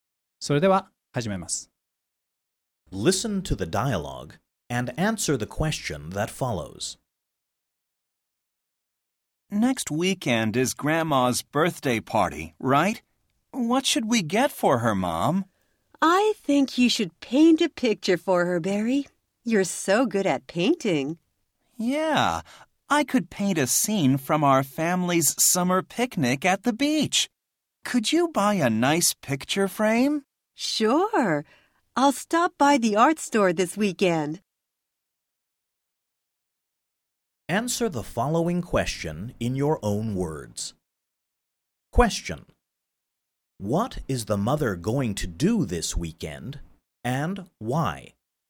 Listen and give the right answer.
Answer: She is going to buy a picture frame because her son will paint a picture as a birthday present for his grandmother.